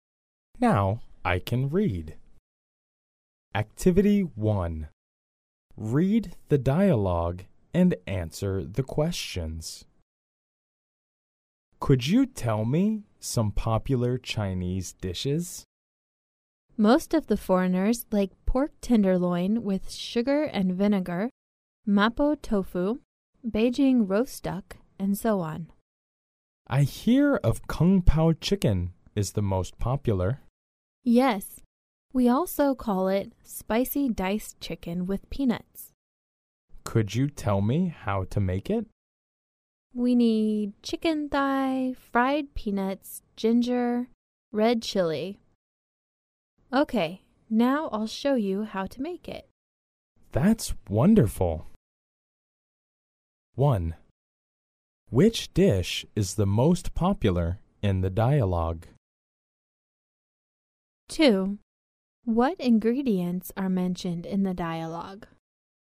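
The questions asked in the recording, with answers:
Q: Which dish is the most popular in the dialogue?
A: Kung Pao chicken (spicy diced chicken with peanuts)

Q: What ingredients are mentioned in the dialogue?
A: Chicken thigh, fried peanuts, ginger, red chili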